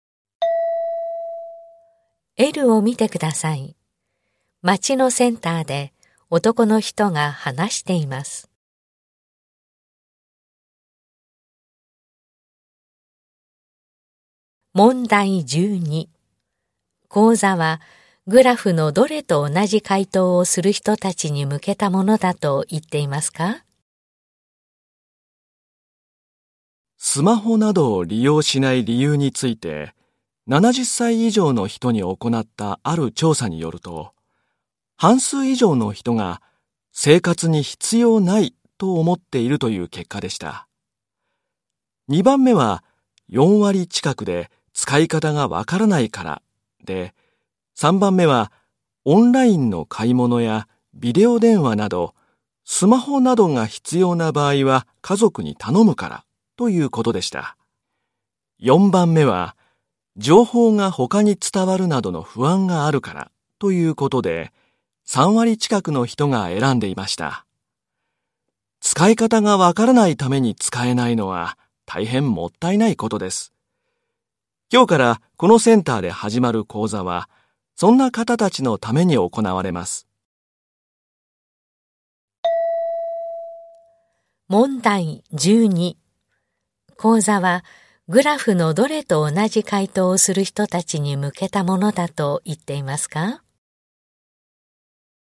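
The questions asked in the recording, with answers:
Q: 講座はグラフのどれと同じ回答をする人たちに向けたものだと言っていますか?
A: 使い方がわからないから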